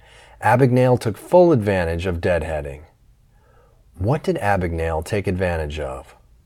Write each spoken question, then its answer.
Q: What did Abagnale take advantage of?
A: Abagnale took advantage of deadheading.